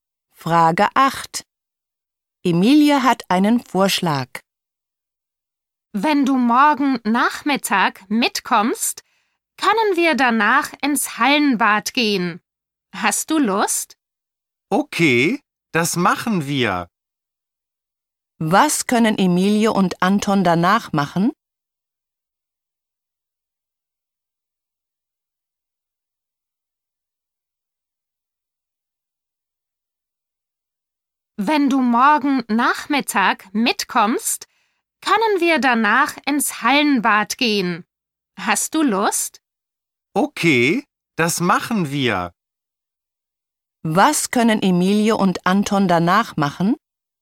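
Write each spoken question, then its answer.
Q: Was können Emilie und Anton danach machen?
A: Ins Hallenbad gehen (schwimmen)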